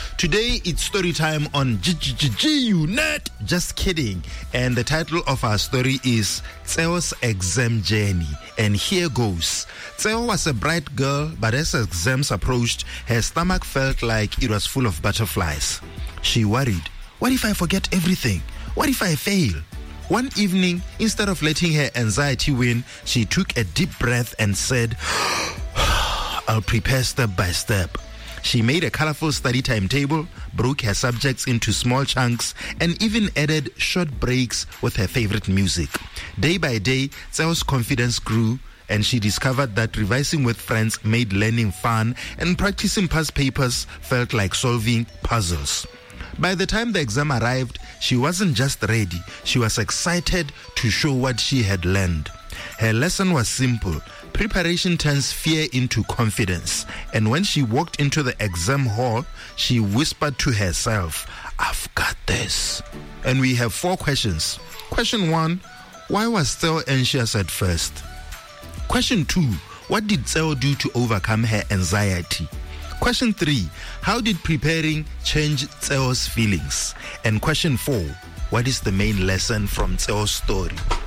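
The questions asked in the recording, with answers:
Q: why was Tseo anxious at first?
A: She thinks she will fail.

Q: what did Tseo do to overcome her anxiety?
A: She prepared step by step with a colorful study timetable, small chunks, breaks, revising with friends and past papers

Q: how did preparing change Tseo's feelings?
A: Her confidence grew and she became excited instead of afraid

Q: what is the main lesson from Tseo's story?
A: Preparation turns fear into confidence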